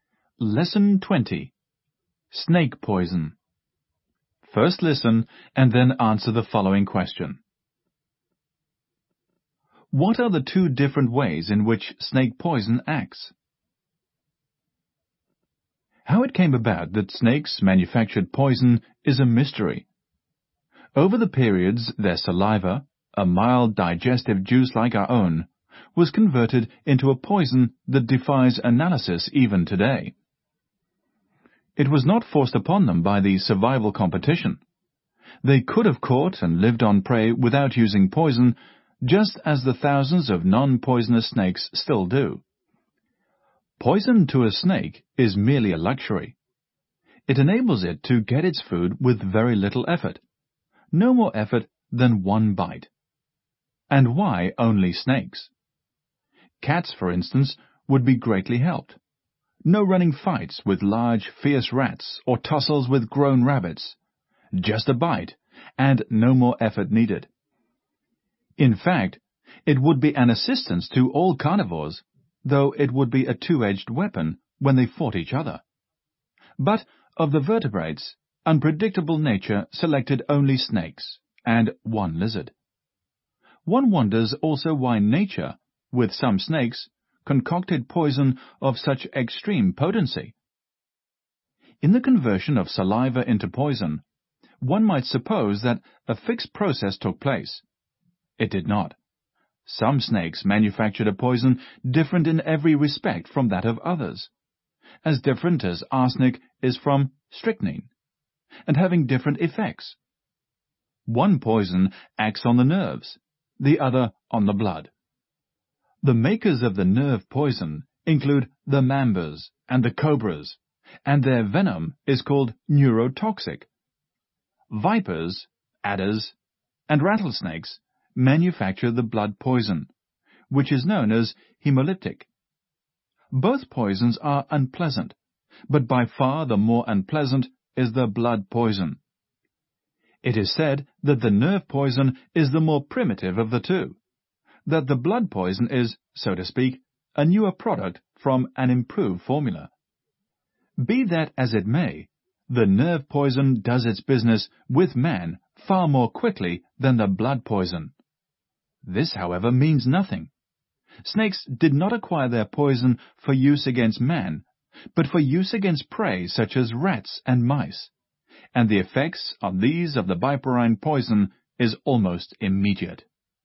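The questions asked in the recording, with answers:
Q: What are the two different ways in which snake poison acts?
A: One poison acts on the nerves (neurotoxic), the other on the blood (hemolytic).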